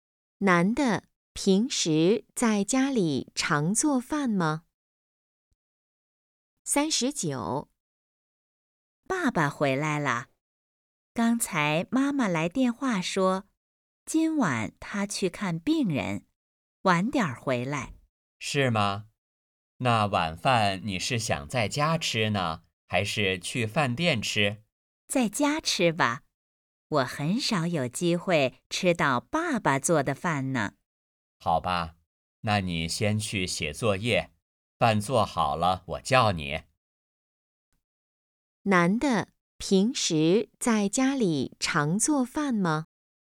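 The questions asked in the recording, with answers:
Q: 男的平时在家里常做饭吗?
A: 不常做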